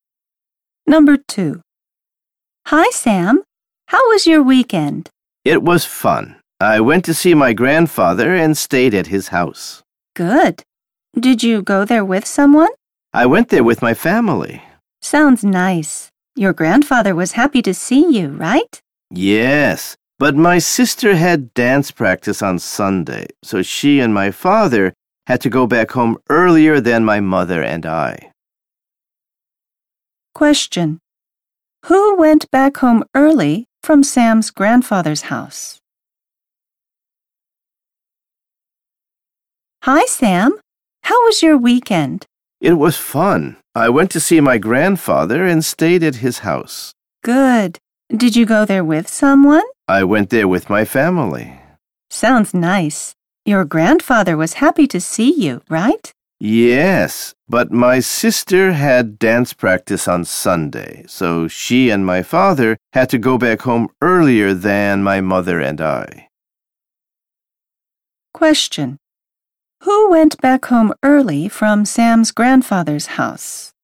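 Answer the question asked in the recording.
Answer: Sam's sister and father.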